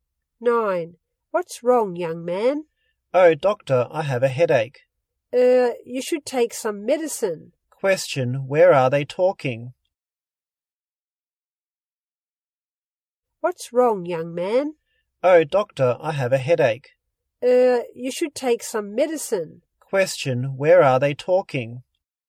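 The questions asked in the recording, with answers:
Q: Where are they talking?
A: In a hospital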